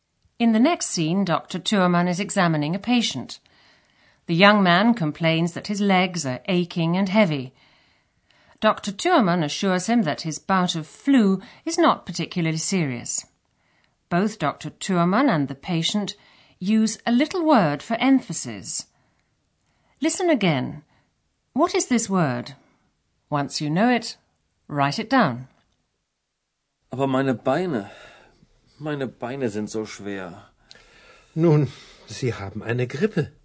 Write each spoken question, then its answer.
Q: What is this word?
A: the little word used in German for emphasis is so.